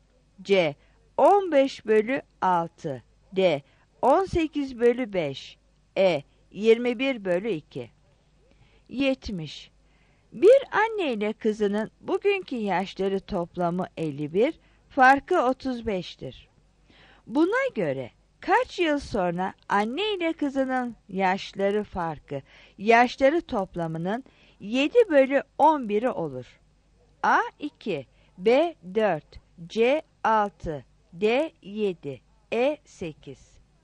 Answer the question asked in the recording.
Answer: 70 A